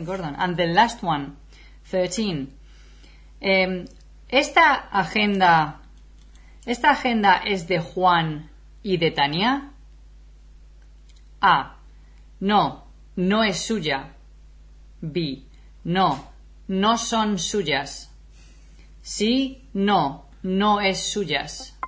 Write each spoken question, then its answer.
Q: Esta agenda es de Juan y de Tania.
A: Okay, so I would say A.